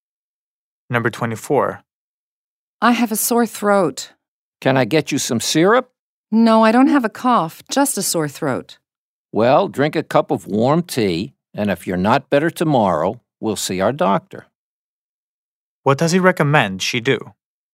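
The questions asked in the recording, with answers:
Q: What does he recommend she do?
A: Drink a cup of warm tea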